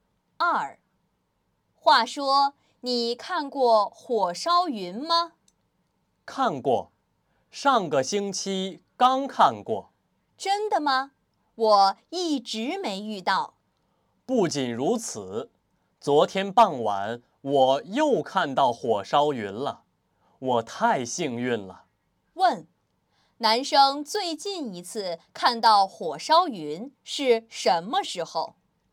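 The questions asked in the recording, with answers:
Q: 男生最近一次看到火烧云是什么时候?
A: 昨天傍晚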